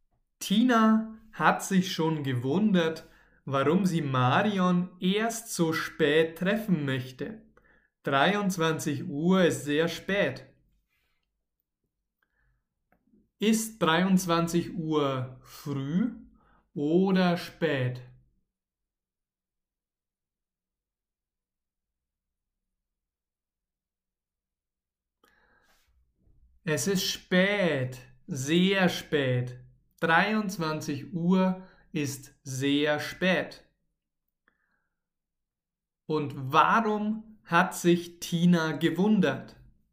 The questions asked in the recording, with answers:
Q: Und warum hat sich Tina gewundert?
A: Sie hat sich gewundert, weil Tina, weil Marion sie erst so spät treffen möchte.